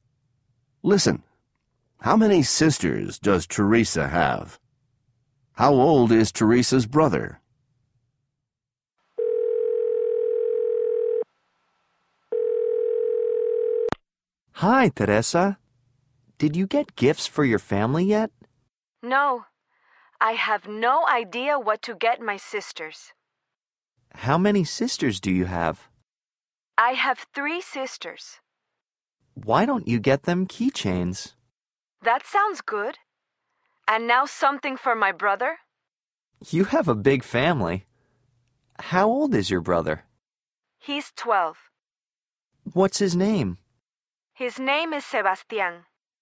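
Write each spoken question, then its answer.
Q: How many sisters does Teresa have?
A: Three

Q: How old is Teresa's brother?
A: 12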